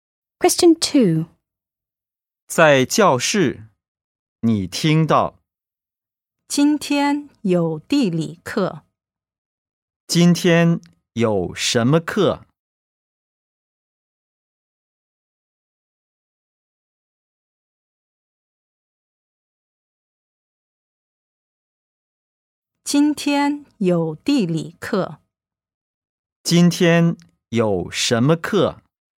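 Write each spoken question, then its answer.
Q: 今天有什么课?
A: 地理课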